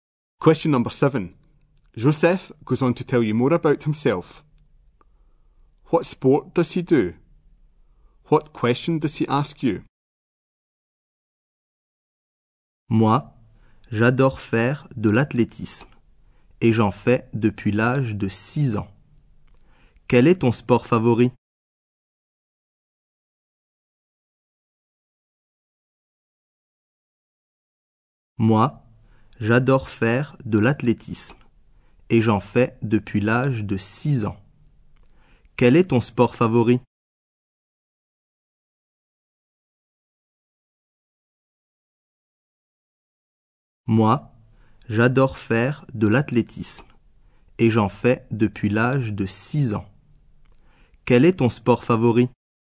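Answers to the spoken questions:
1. Athletics
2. What is your favourite sport?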